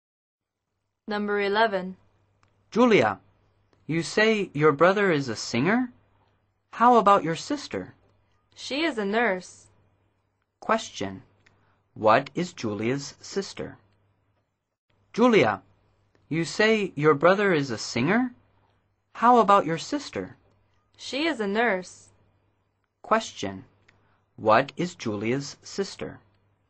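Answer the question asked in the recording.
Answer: A nurse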